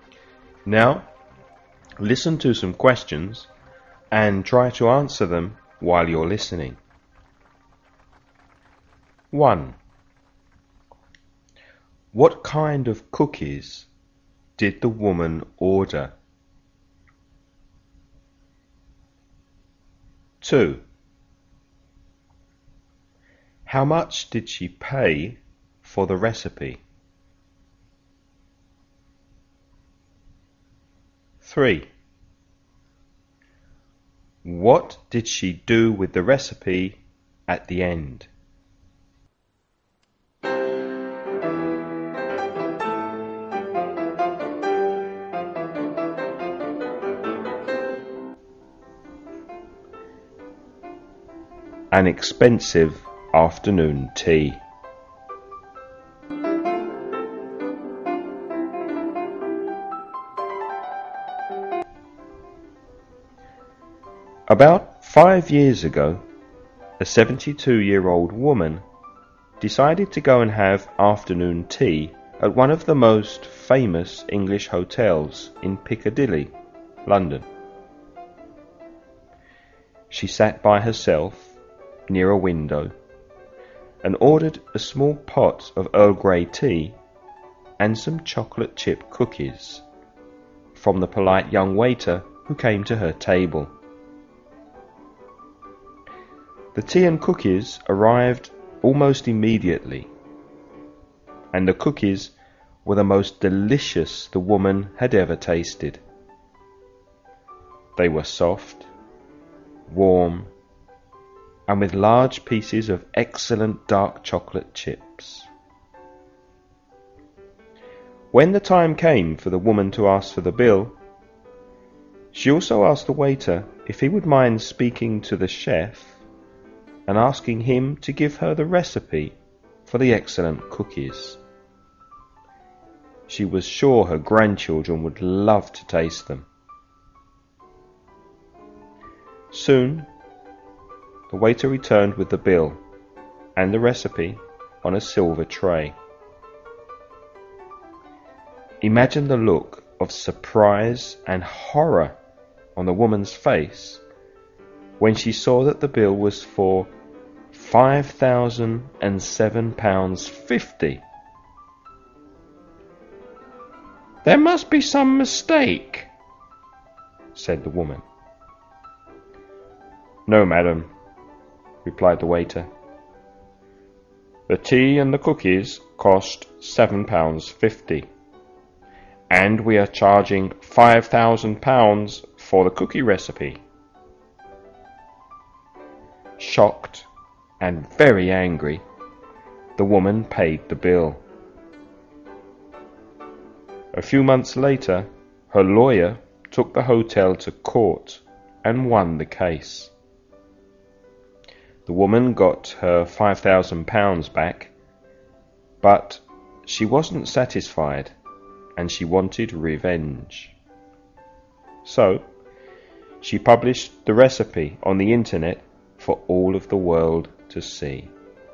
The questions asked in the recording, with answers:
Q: How much did she pay for the recipe?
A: £5,000.

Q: What did she do with the recipe at the end?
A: She published it on the internet.